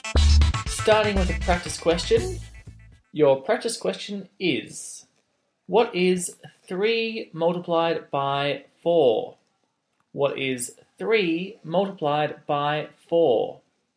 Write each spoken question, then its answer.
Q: what is 3 multiplied by 4?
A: The answer to your practice question is 12.